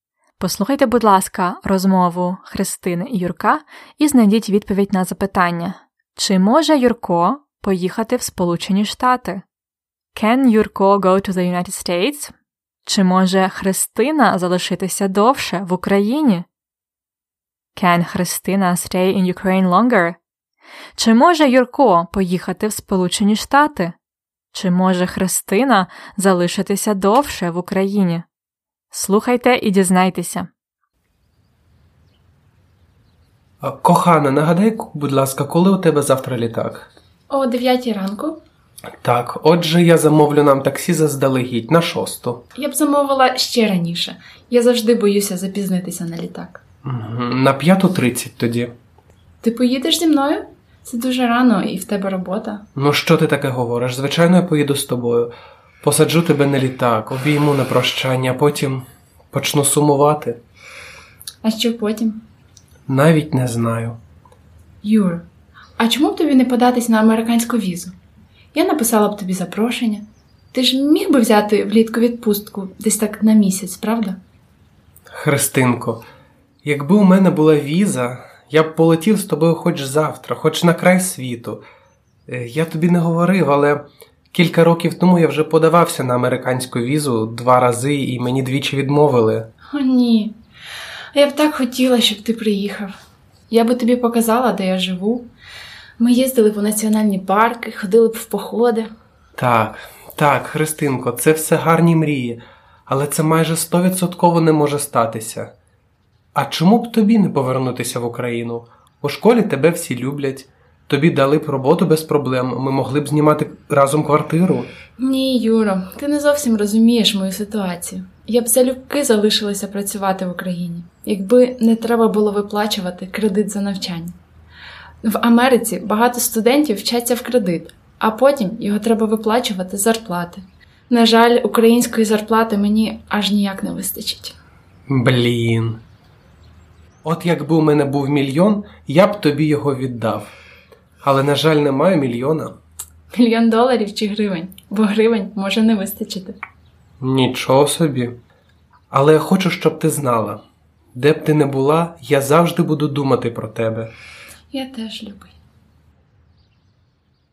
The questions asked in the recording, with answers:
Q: Чи може Юрко поїхати в Сполучені Штати?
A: На жаль, ні. Він не може поїхати в Сполучені Штати.

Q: Чи може Христина залишитися довше в Україні?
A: Ні. Вона не може залишитися в Україні довше.